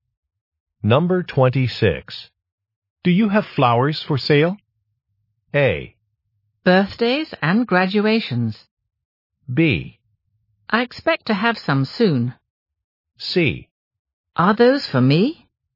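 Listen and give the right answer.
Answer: B: I expect to have some soon.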